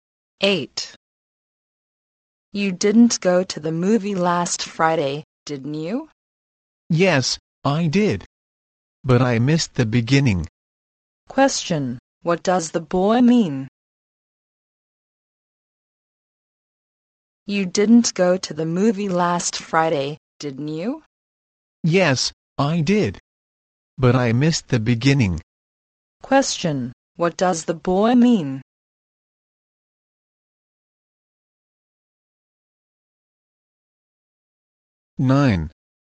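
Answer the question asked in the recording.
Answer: He went to the movie but arrived late and missed the beginning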